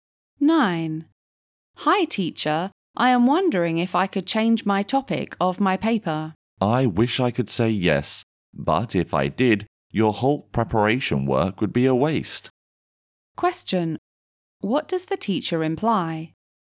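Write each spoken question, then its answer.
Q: What does the teacher imply?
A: The student shouldn't change the paper topic, because his preparation work would be wasted.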